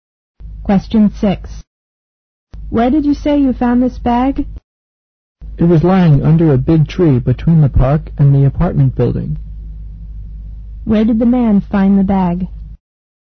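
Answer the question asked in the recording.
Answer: Under a big tree between the park and the apartment building.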